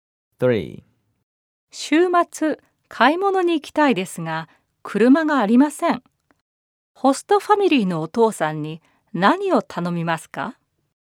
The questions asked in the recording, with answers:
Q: 週末、買い物に行きたいですが、車がありません。ホストファミリーのお父さんに何を頼みますか?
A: 車で買い物に連れて行ってもらえませんか?